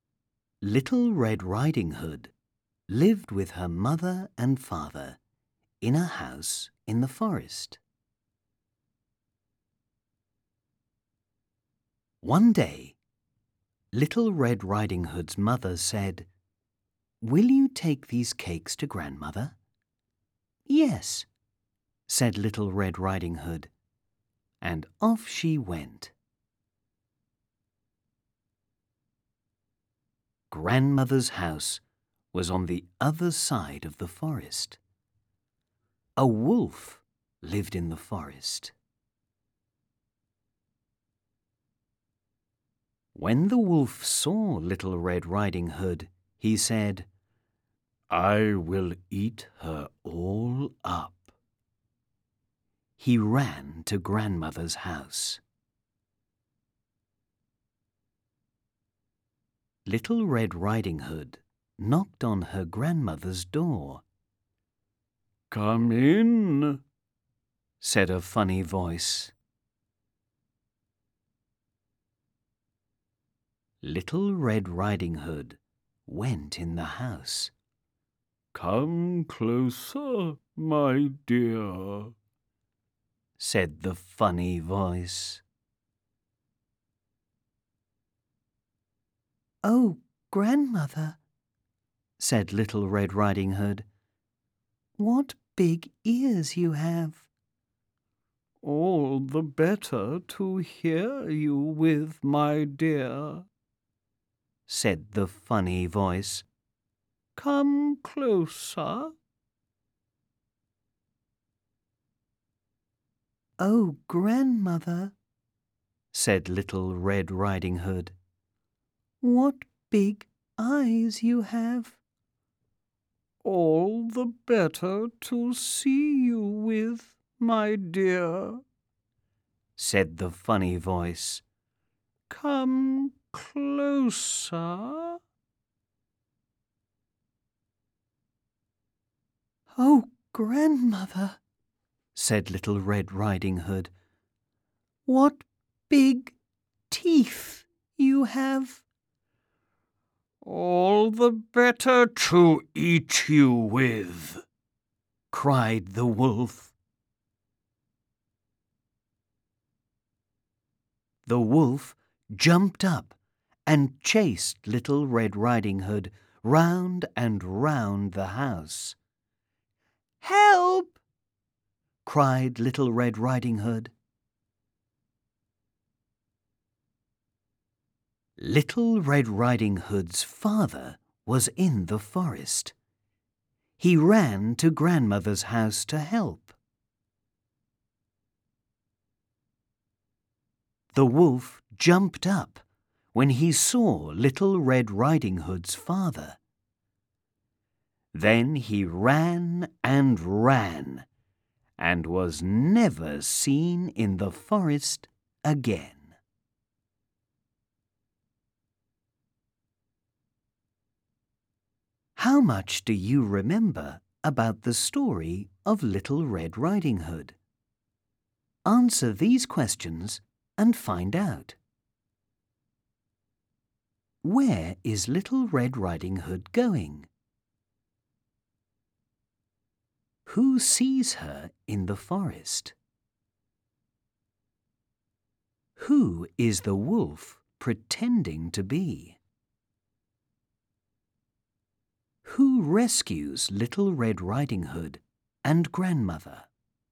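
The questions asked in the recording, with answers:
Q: Where is Little Red Riding Hood going?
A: To Grandmother's house

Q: Who sees her in the forest?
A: A wolf

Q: Who is the wolf pretending to be?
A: Grandmother

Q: Who rescues Little Red Riding Hood and Grandmother?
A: Little Red Riding Hood's father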